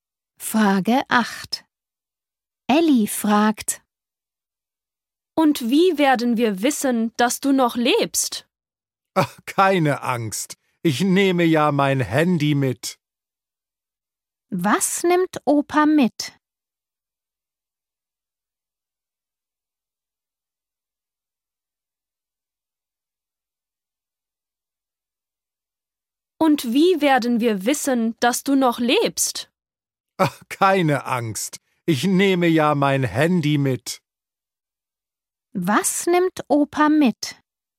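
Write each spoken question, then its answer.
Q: Was nimmt Opa mit?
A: sein Handy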